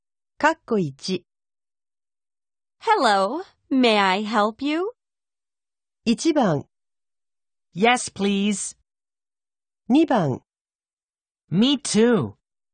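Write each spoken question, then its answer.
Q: Hello, may I help you?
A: 1: Yes, please.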